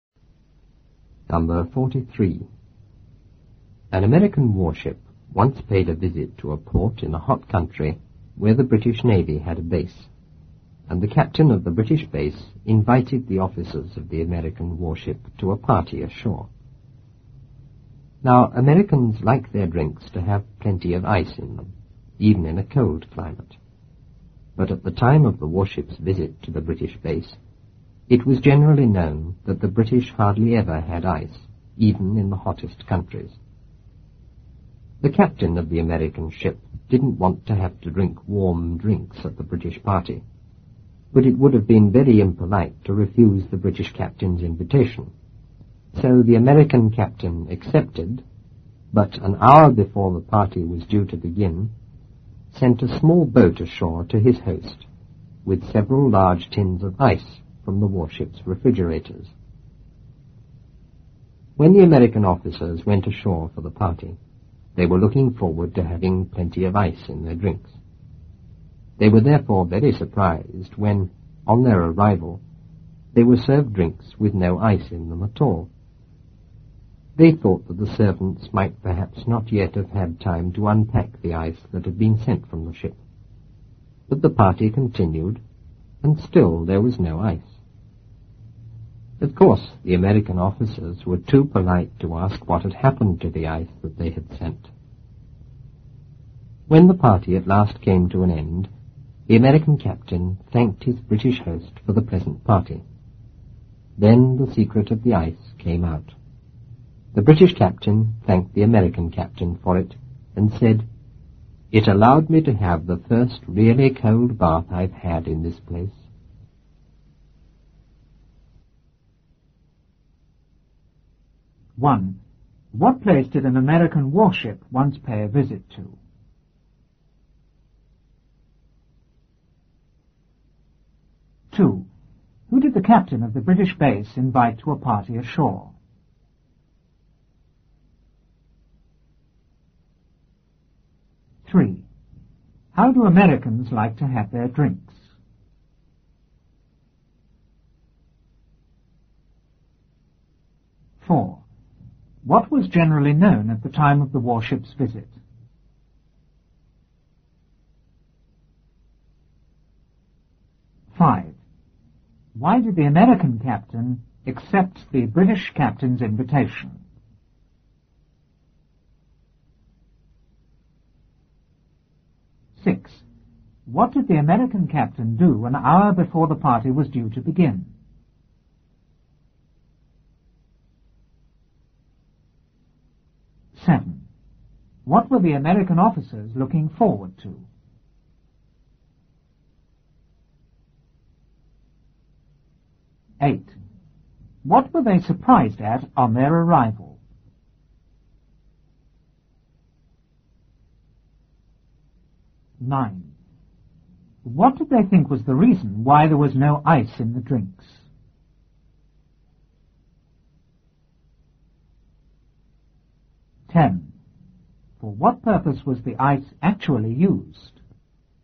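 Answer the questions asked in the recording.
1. A port in a hot country where the British Navy had a base
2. The officers of the American warship
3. With plenty of ice in them
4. That the British hardly ever had ice, even in the hottest countries
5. Because refusing would have been very impolite
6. He sent a small boat ashore with several large tins of ice
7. Having plenty of ice in their drinks
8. They were served drinks with no ice in them
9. The servants had not yet had time to unpack the ice
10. For the British captain's cold bath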